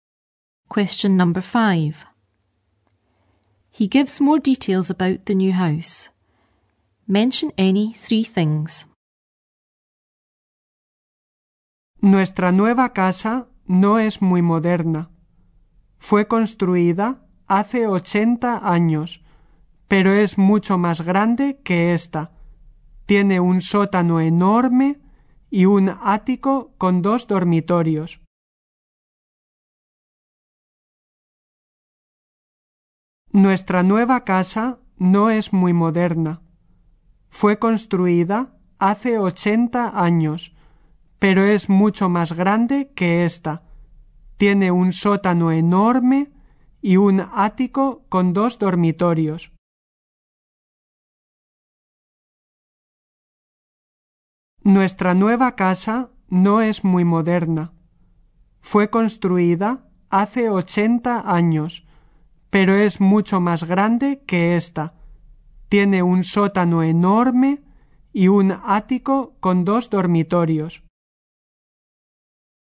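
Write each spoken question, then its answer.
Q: He gives more details about the new house.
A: Not very modern; built 80 years ago; much bigger; huge basement; attic with two bedrooms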